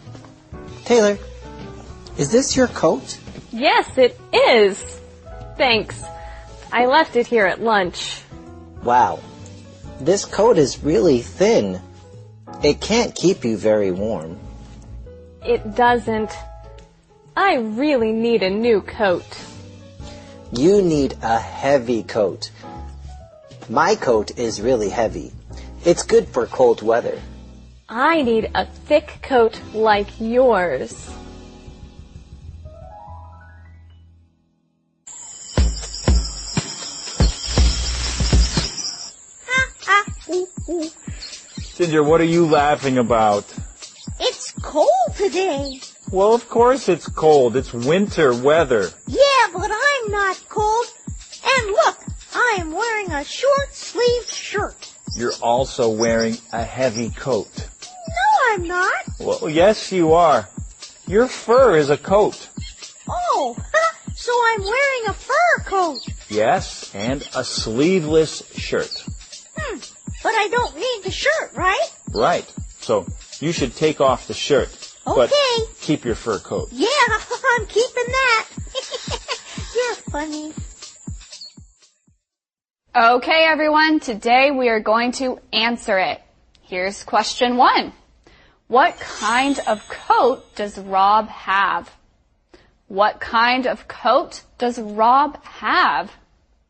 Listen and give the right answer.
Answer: Rob has a heavy coat.